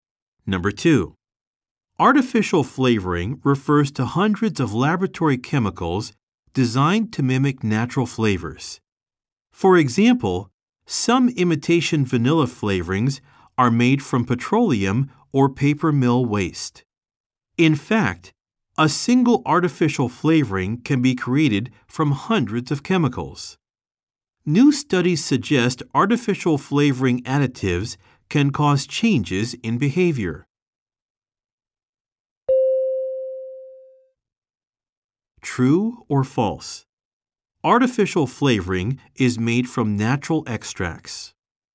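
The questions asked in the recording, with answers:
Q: True or false? Artificial flavoring is made from natural extracts.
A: False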